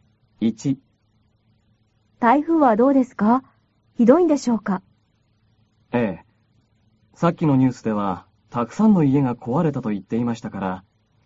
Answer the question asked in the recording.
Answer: 台風はかなりひどいようです。